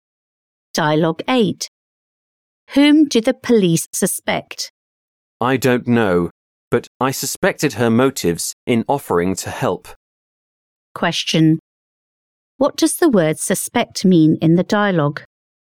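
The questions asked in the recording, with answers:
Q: What does the word suspect mean in the dialogue?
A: to doubt or distrust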